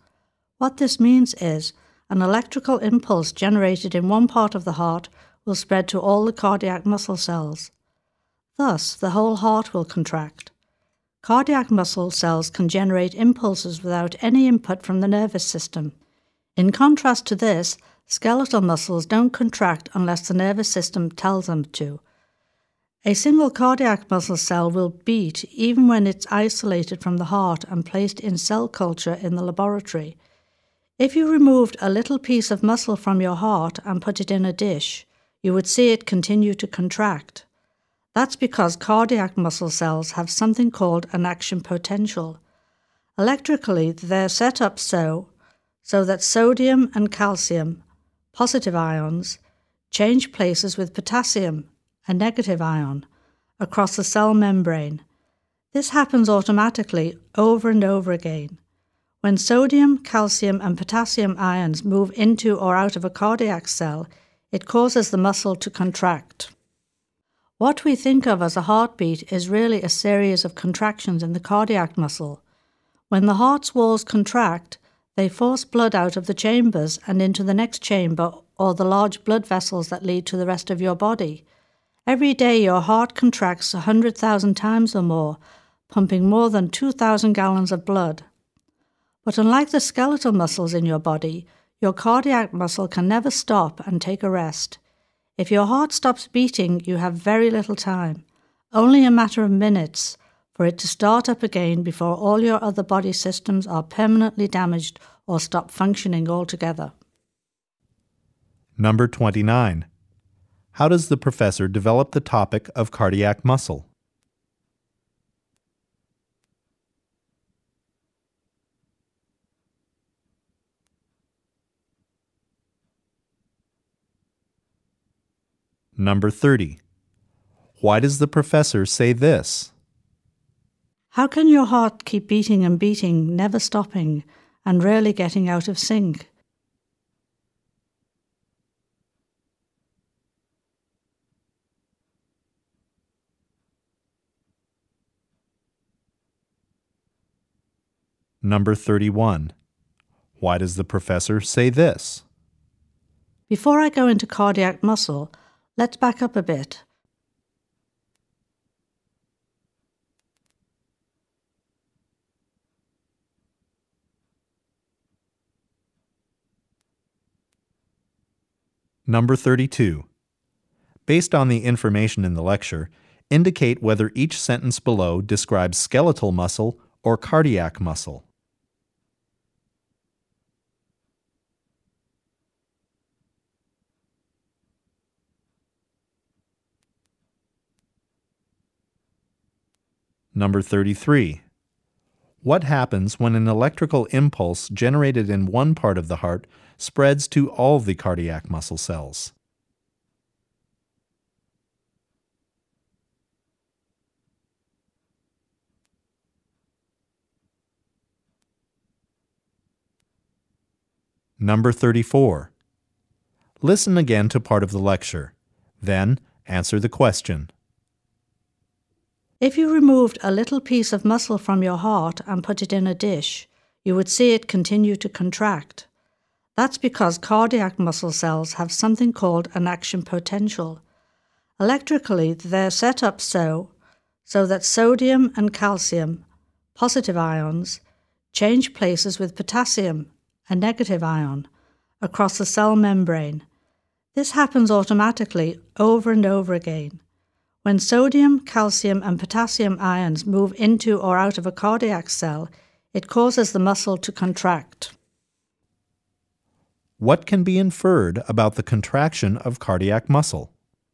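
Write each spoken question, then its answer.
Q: What happens when an electrical impulse generated in one part of the heart spreads to all the cardiac muscle cells?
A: The whole heart contracts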